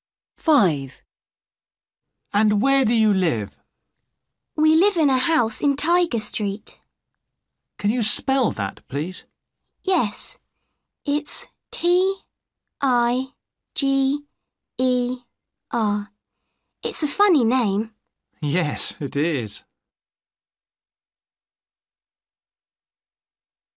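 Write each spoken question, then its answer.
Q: And where do you live?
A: Tiger Street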